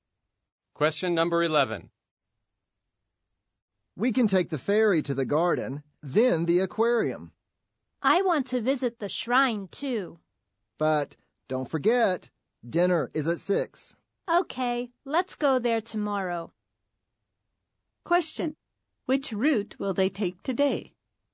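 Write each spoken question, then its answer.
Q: Which route will they take today?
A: Ferry to the garden, then the aquarium (not the shrine)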